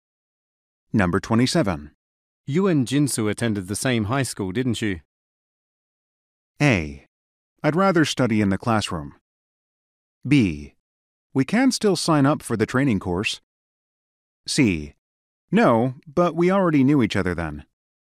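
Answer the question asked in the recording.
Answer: C: No, but we already knew each other then.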